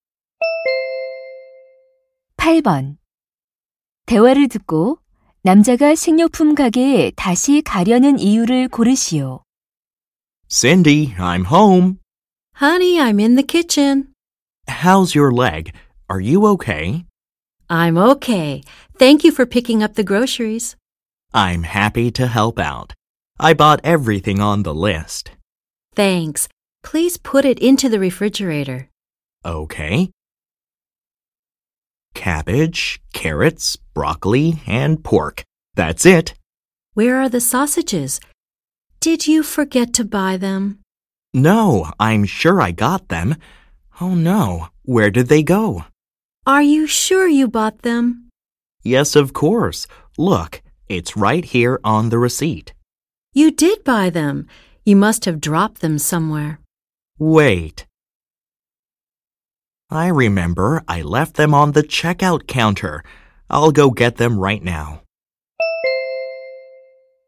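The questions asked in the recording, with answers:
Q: 대화를 듣고 남자가 식료품 가게에 다시 가려는 이유를 고르시오.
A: 계산대에 두고 온 소시지를 가져오려고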